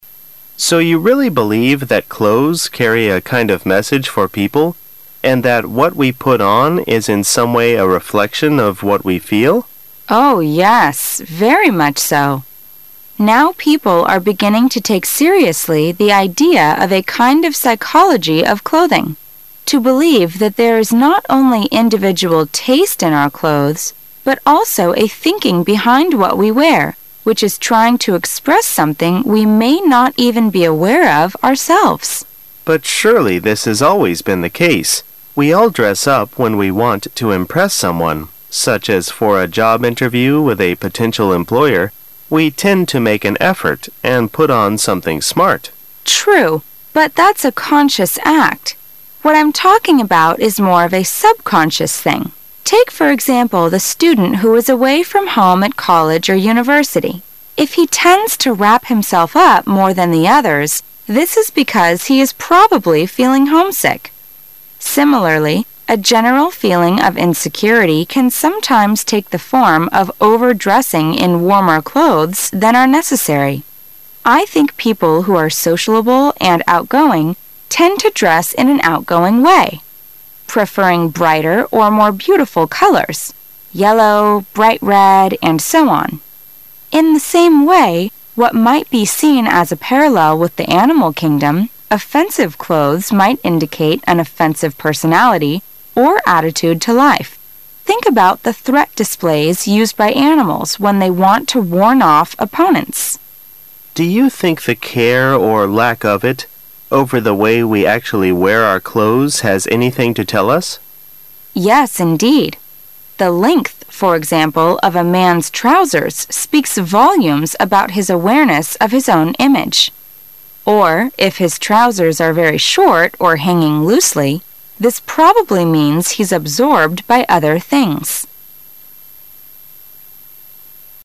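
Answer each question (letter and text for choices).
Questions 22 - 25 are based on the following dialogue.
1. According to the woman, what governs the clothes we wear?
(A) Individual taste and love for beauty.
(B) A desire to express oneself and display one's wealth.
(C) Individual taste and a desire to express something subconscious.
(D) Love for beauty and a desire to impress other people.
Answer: (C) Individual taste and a desire to express something subconscious.

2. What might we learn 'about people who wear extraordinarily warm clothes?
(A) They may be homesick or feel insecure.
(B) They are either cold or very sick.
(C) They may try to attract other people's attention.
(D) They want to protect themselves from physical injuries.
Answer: (A) They may be homesick or feel insecure.

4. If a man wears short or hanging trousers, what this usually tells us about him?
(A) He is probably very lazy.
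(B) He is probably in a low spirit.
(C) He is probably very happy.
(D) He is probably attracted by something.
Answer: (D) He is probably attracted by something.

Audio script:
[解析] 22-25 M: So you really believe that clothes carry a kind of message for people and that what we put on is in some way a reflection of what we feel? W: Oh yes, very much so. Now people are beginning to take seriously the idea of a kind of psychology of clothing, to believe that there is not only individual taste in our clothes but also a thinking behind what we wear which is trying to express something we may not even be aware of ourselves. M: But surely this has always been the ease. We all dress up when we want to impress someone, such as for a job interview with a potential employer; we tend to make an effort and put on something smart. W: True, but that's a conscious act. What I'm talking about is more of a subconscious thing. 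Take for example the student who is away from home at college or university: if he tends to wrap himself up more than the others, this is because he is probably feeling homesick. Similarly, a general feeling of insecurity can sometimes take the form of over-dressing in warmer clothes than are necessary. I think people who are sociable and outgoing tend to dress in an outgoing way, preferring brighter or more beautiful colors --yellow, bright red, and so on. In the same way, what might be seen as, a parallel with the animal kingdom, offensive clothes might indicate an offensive personality or attitude to life. Think about the threat displays used by animals when they want to warn off opponents. M: Do you think the care -- or lack of it -- over the way we actually wear our clothes has anything to tell us? W: Yes, indeed. The length, for example, of a man's trousers speaks volumes about his awareness of his own image. 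Or, if his trousers are very short or hanging loosely, this probably means he's absorbed by other things.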